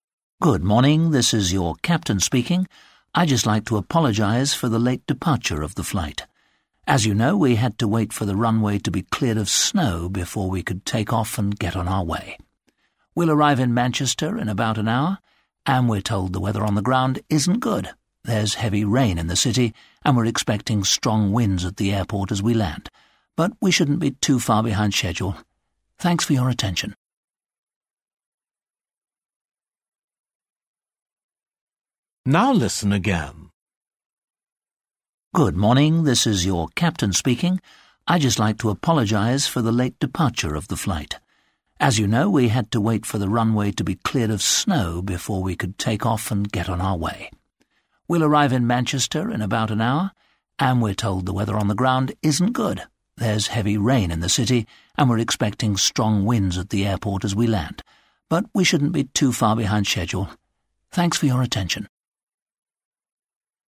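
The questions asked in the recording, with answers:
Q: Why did the plane leave late?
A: Because of snow on the runway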